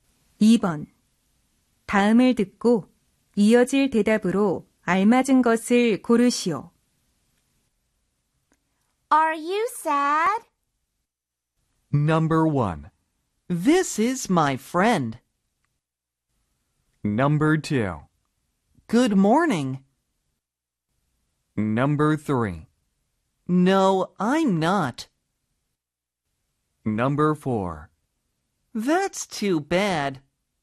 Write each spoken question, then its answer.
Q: Are you sad?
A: 따라서 정답은 3번입니다.